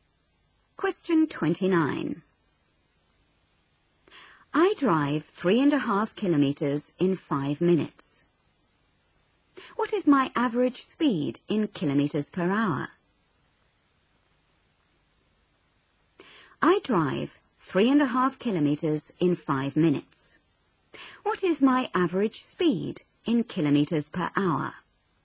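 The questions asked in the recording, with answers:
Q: What is my average speed in kilometres per hour?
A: 42 km/h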